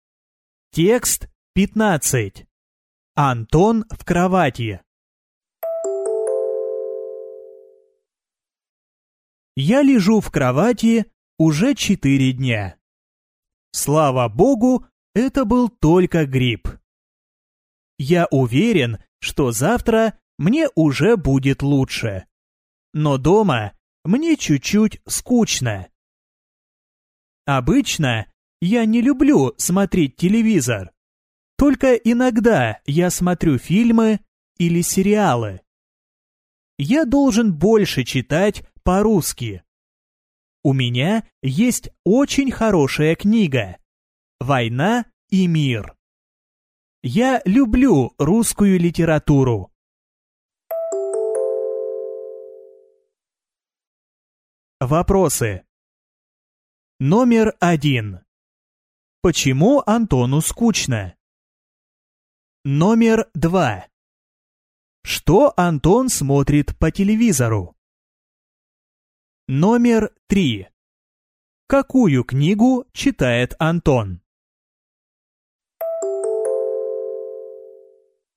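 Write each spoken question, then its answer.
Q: Почему Антону скучно?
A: Он уже 4 дня лежит дома в кровати с гриппом.

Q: Что Антон смотрит по телевизору?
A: Иногда фильмы или сериалы.

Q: Какую книгу читает Антон?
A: «Война и мир».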